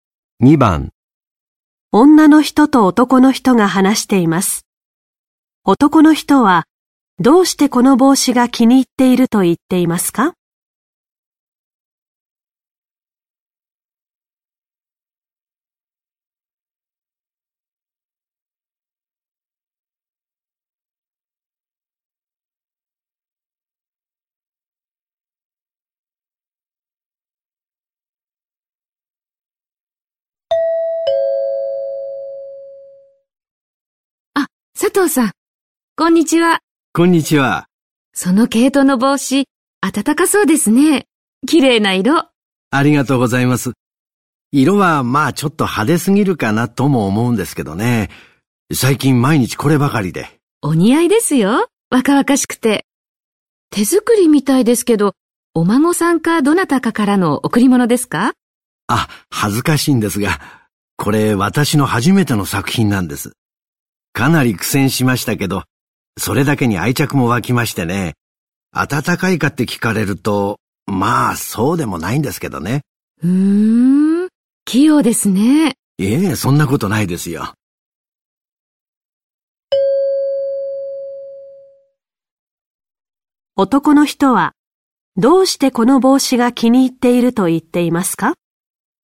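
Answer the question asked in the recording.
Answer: 初めて自分で作った作品で愛着があるから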